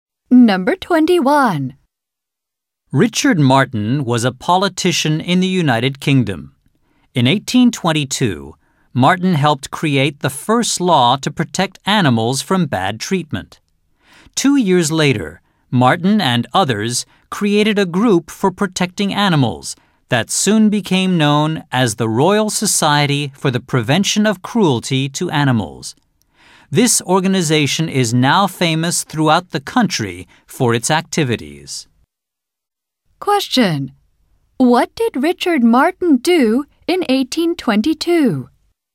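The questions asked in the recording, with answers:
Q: What did Richard Martin do in 1822?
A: He helped create the first law to protect animals from bad treatment.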